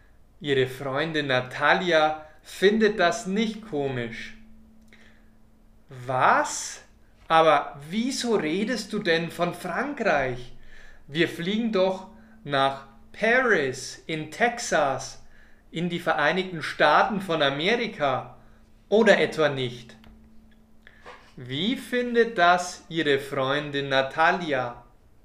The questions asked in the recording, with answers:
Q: Wie findet das Ihre Freundin Natalia?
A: Nicht komisch. Ihre Freundin Natalia findet das nicht komisch.